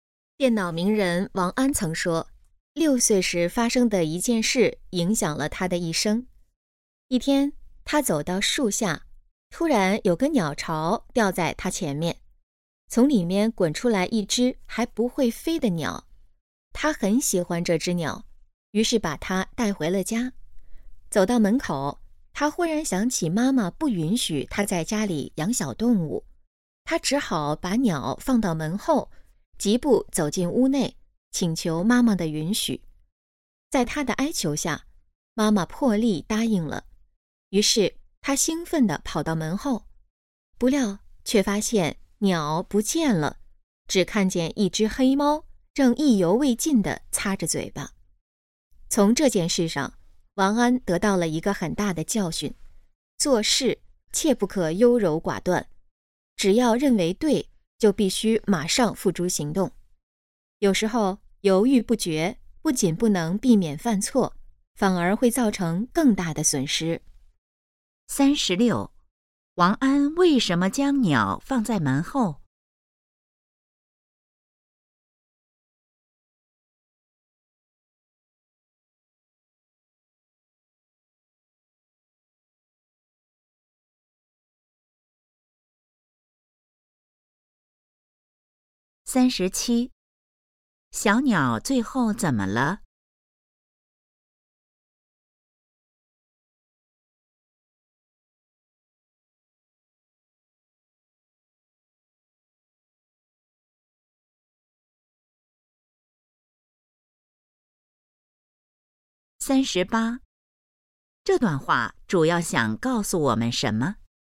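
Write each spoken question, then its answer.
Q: 王安为什么将鸟放在门后?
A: 妈妈不允许他在家里养小动物

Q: 小鸟最后怎么了?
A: 被黑猫吃了

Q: 这段话主要想告诉我们什么?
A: 做事不可优柔寡断,认为对就马上行动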